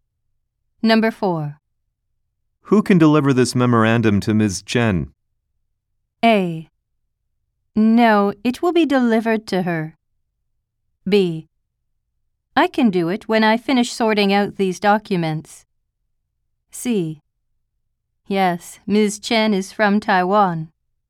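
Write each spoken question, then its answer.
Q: Who can deliver this memorandum to Ms. Chen?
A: B: I can do it when I finish sorting out these documents.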